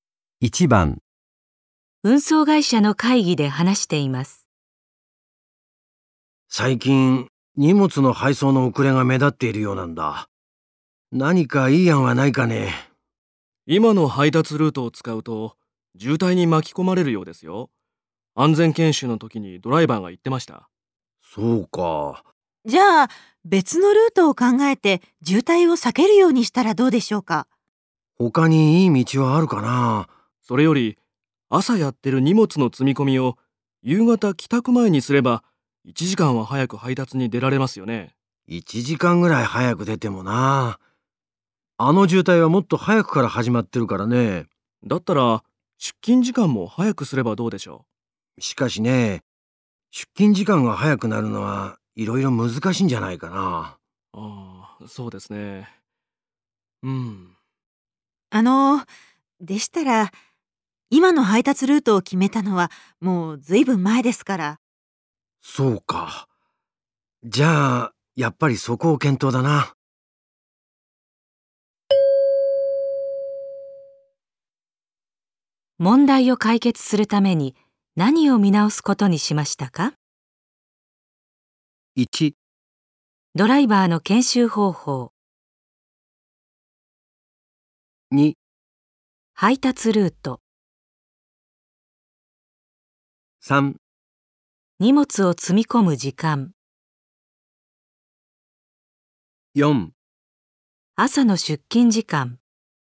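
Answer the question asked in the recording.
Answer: 2: 配達ルート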